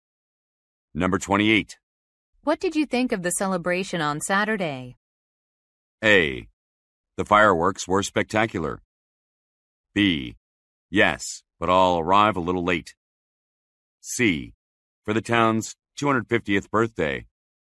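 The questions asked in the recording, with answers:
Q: What did you think of the celebration on Saturday?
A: A: The fireworks were spectacular.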